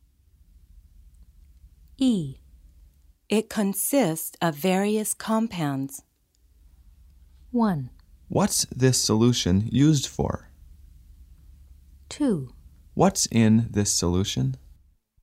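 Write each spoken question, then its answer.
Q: It consists of various compounds.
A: 2: What's in this solution?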